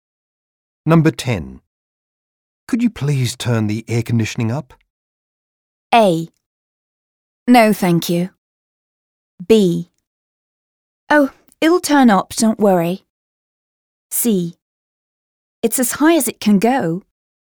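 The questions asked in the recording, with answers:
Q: Could you please turn the air conditioning up?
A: C: It's as high as it can go.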